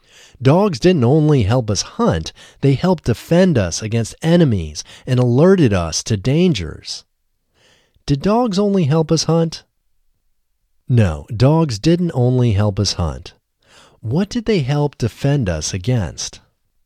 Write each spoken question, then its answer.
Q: What did they help defend us against?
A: They helped defend us against enemies.